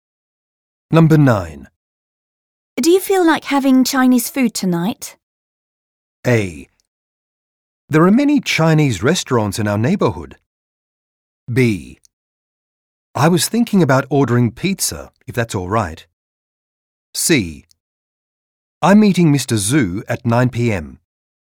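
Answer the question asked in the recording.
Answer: B: I was thinking about ordering pizza, if that's all right.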